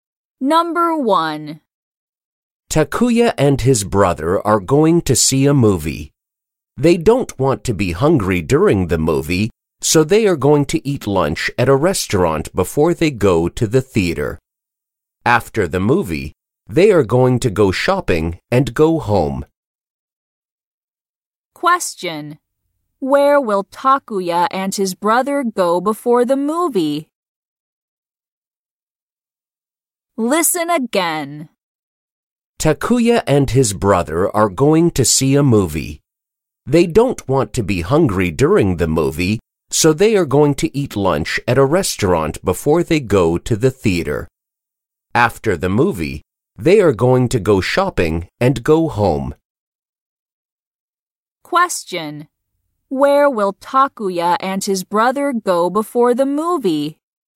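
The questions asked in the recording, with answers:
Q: Where will Takuya and his brother go before the movie?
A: To a restaurant.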